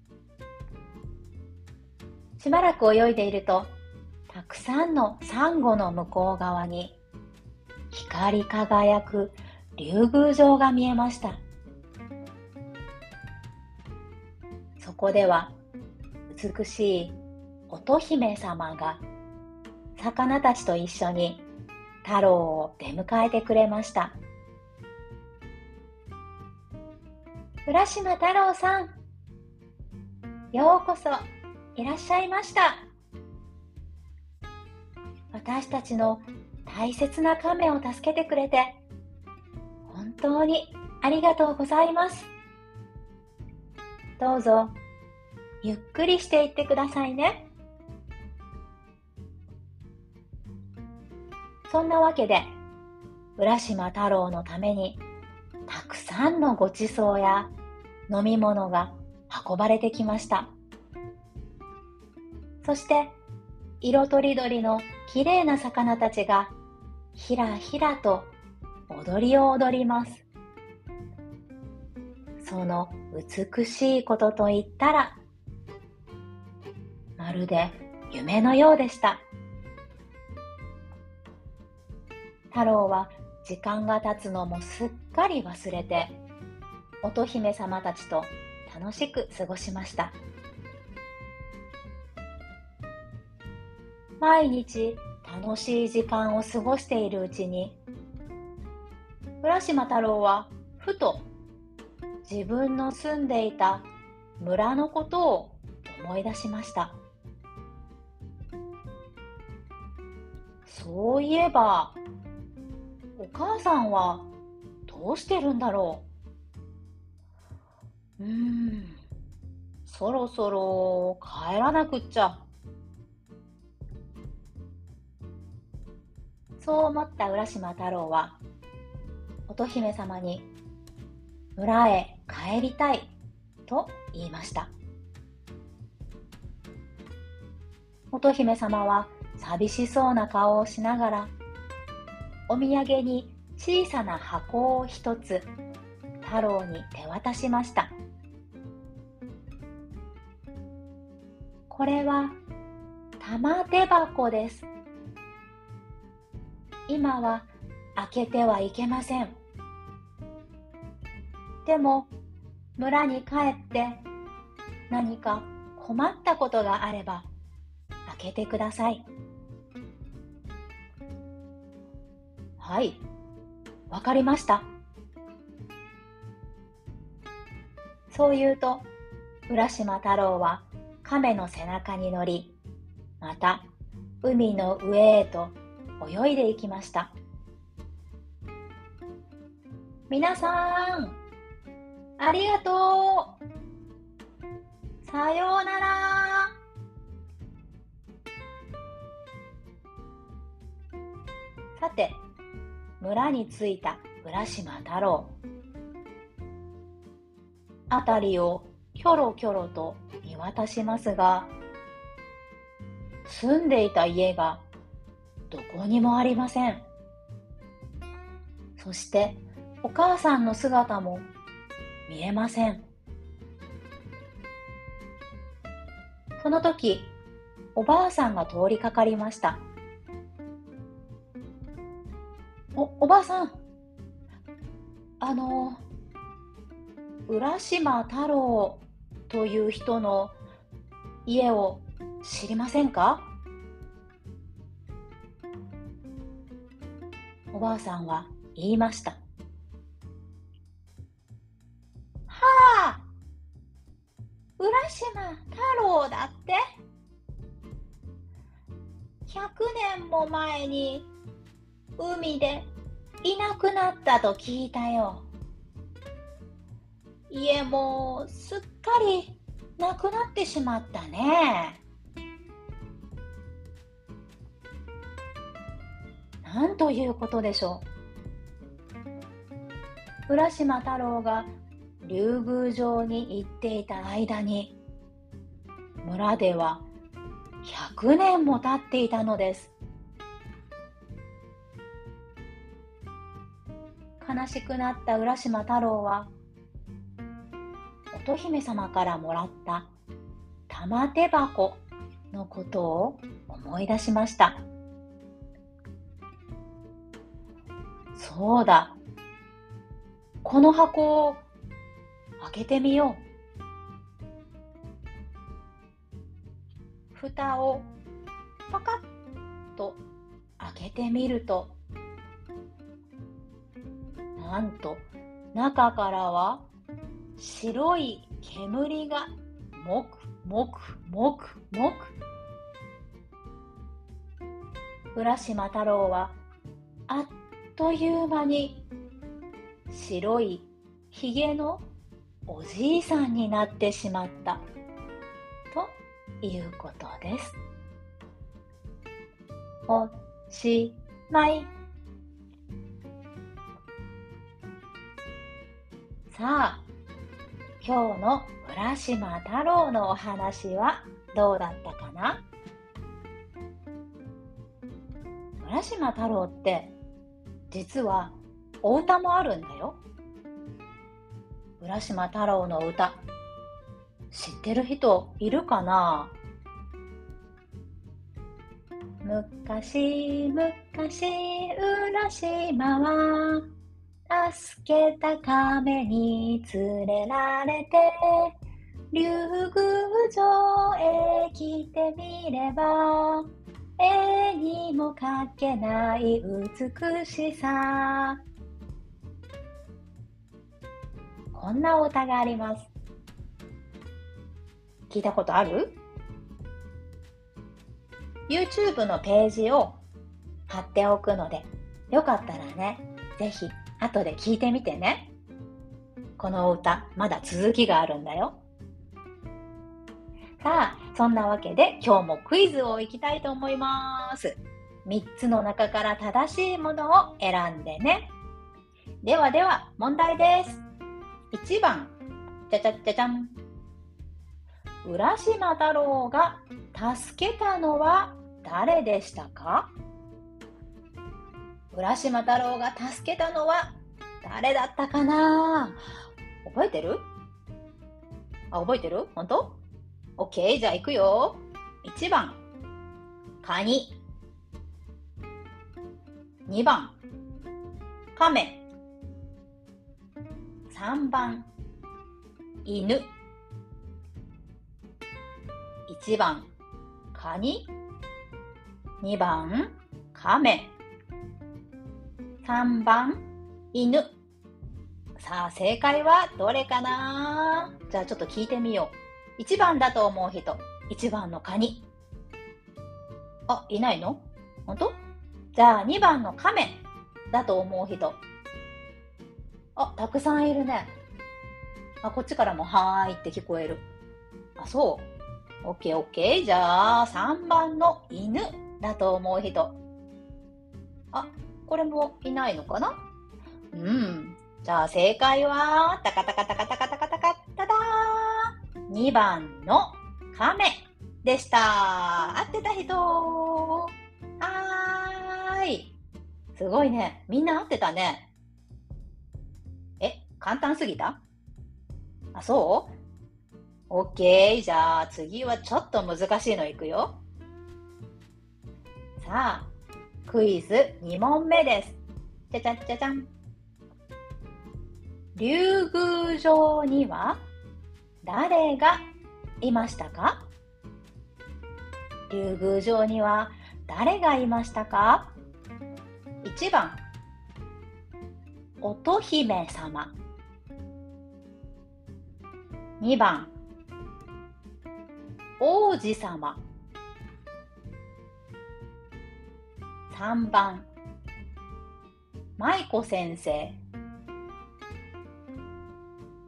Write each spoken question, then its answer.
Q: 竜宮城には誰がいましたか?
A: 1 の乙姫様でした